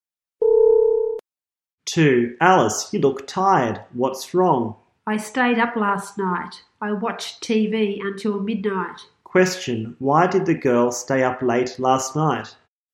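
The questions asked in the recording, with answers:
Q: Why did the girl stay up late last night?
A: She watched TV until midnight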